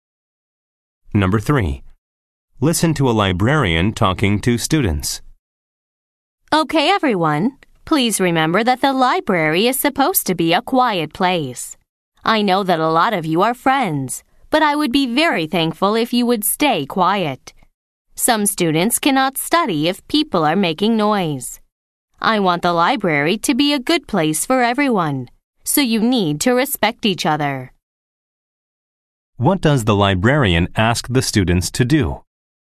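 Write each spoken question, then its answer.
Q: What does the librarian ask the students to do?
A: Stay quiet in the library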